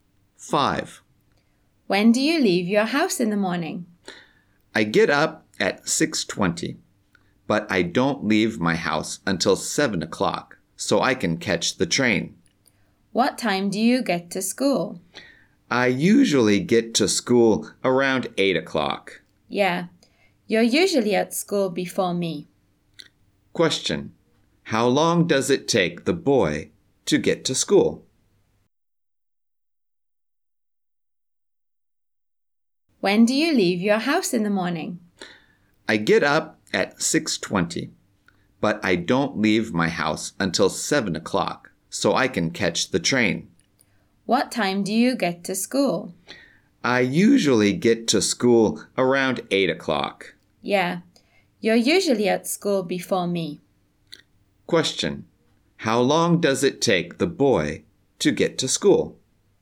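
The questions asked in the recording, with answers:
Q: How long does it take the boy to get to school?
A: About one hour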